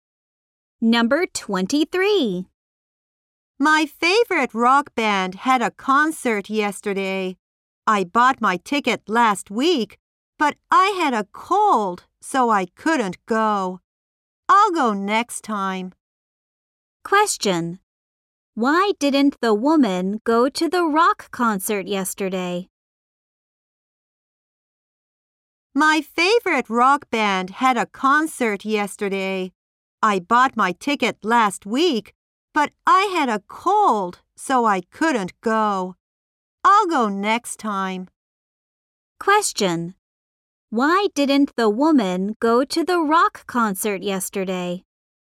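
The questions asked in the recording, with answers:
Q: Why didn't the woman go to the rock concert yesterday?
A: Because she had a cold.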